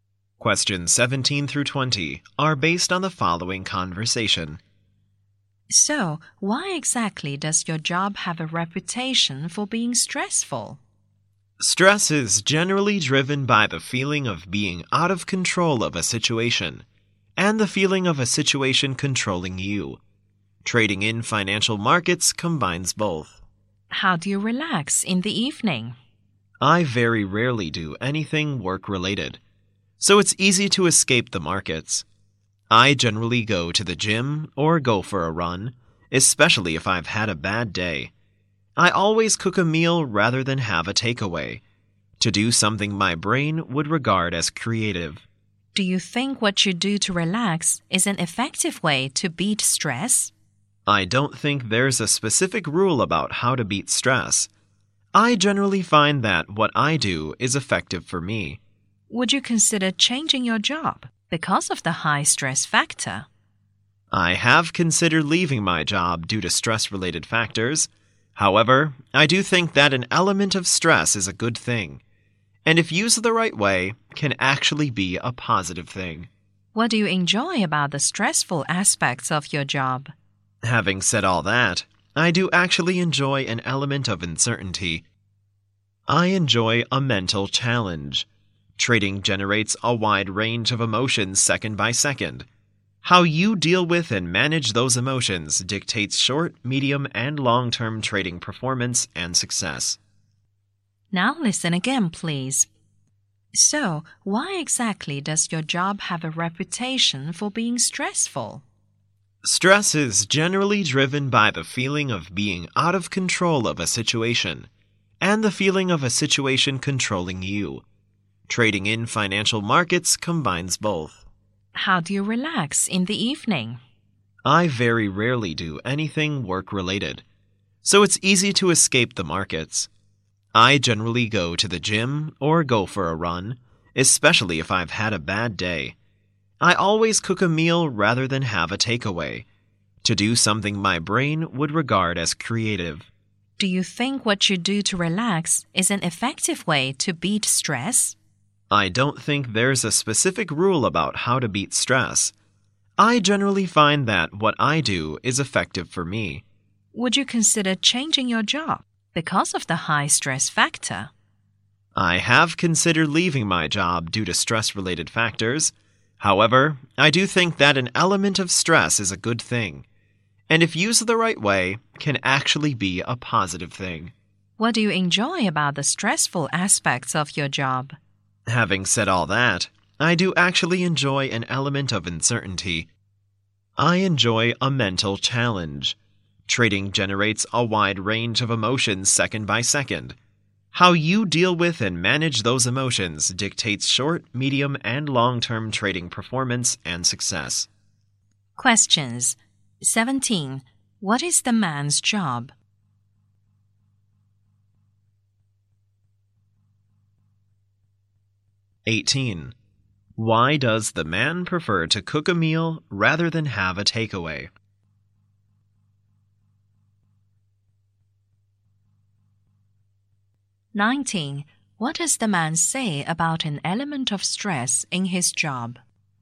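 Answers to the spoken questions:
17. A trader in financial markets
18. To do something creative
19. It can be a positive thing if used the right way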